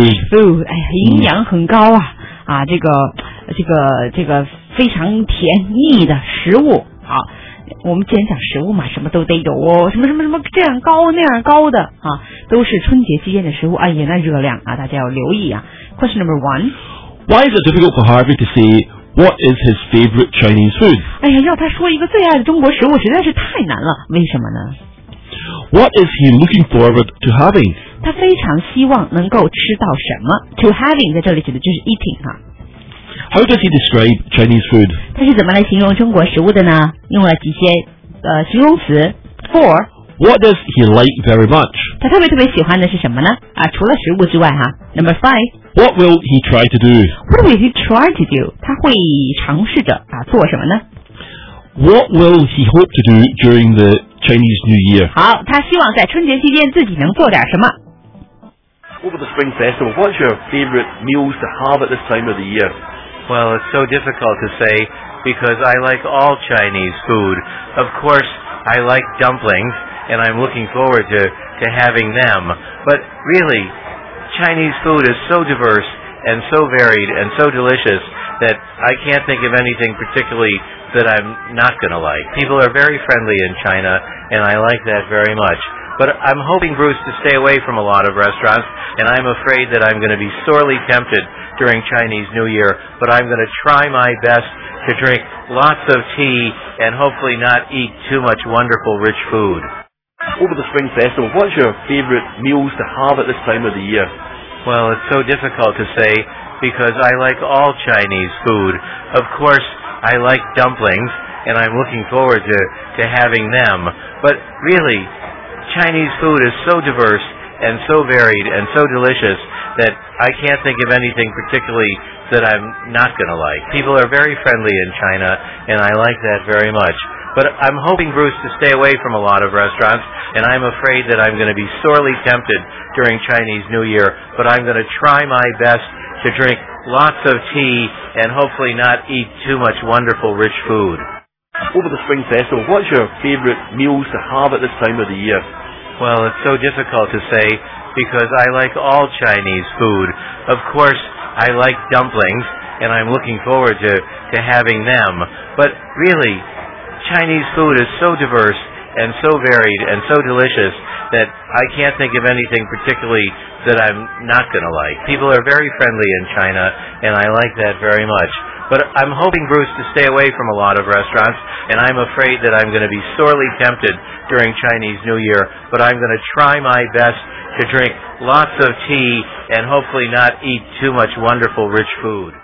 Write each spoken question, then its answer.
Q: Why is it difficult for Harvey to say what is his favorite Chinese food?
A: It's because he likes all Chinese food.

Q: What is he looking forward to having?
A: Dumplings 就是饺子啊,饺子是正确答案。

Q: How does he describe Chinese food?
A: Well, he thinks it's so varied, it's so diverse, and it's so delicious.

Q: what does he like very much?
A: Well, he finds that people are very friendly at this time of the year.